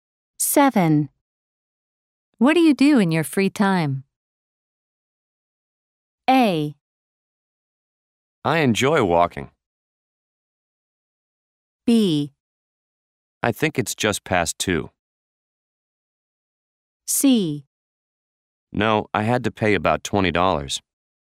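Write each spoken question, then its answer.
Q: What do you do in your free time?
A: A: I enjoy walking.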